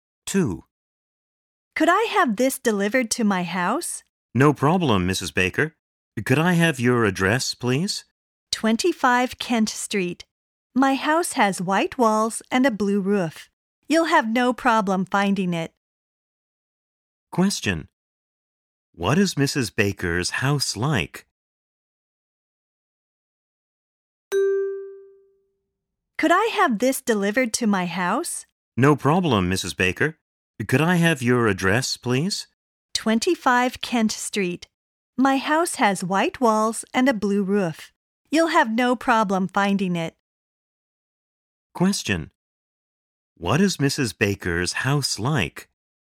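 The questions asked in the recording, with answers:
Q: What is Mrs. Baker's house like?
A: It has white walls and a blue roof.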